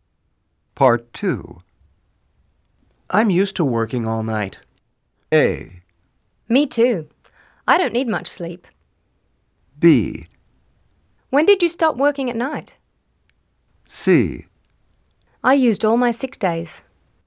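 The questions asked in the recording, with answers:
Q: I'm used to working all night.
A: A: Me too. I don't need much sleep.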